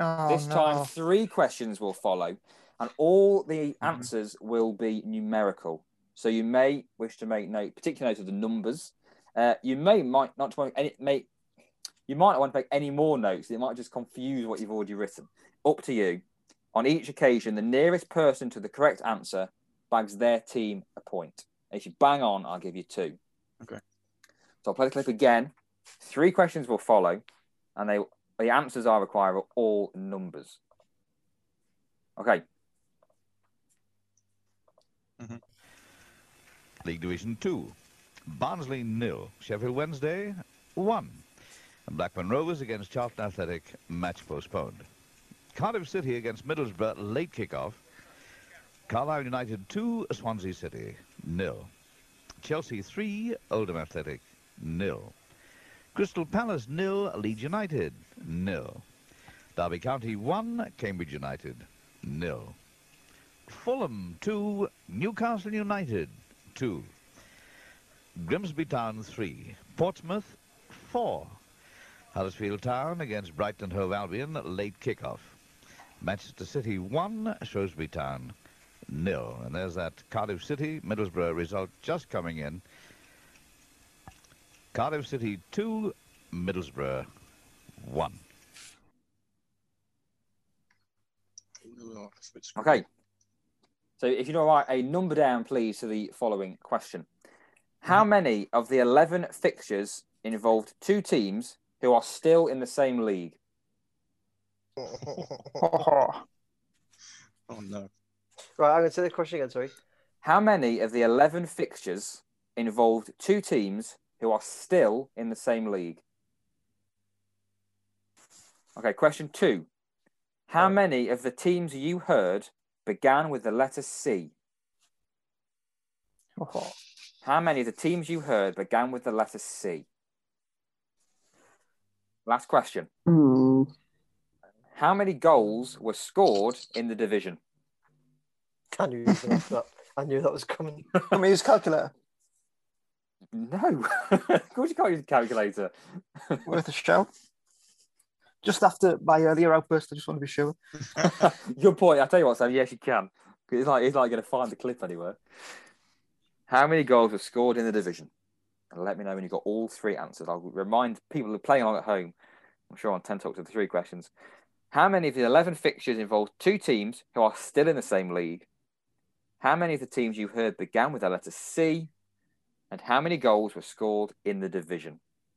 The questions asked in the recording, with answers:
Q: How many of the teams you heard began with the letter C?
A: The answer is six.

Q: How many goals were scored in the division?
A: It was indeed 22